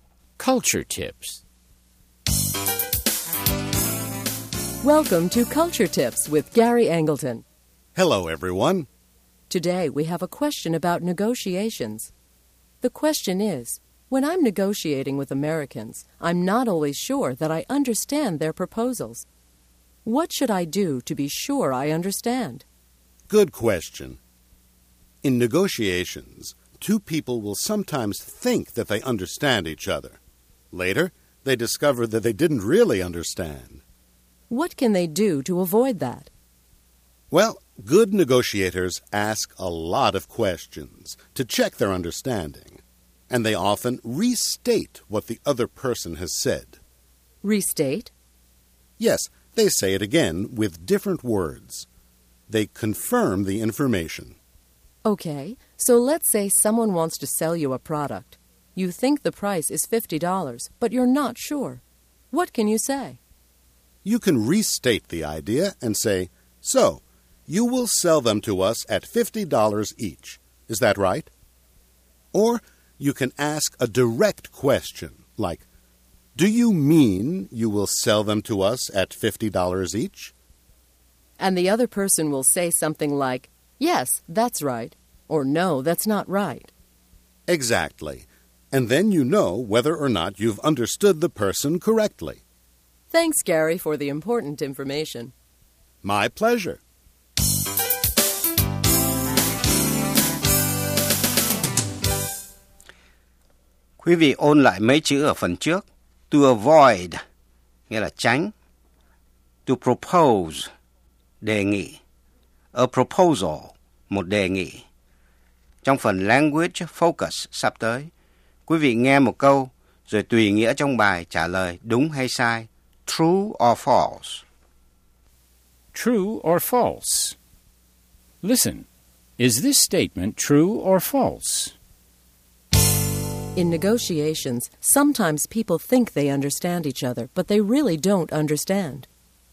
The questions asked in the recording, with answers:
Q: In negotiations, sometimes people think they understand each other, but they really don't understand.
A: True. This can cause big problems in negotiations.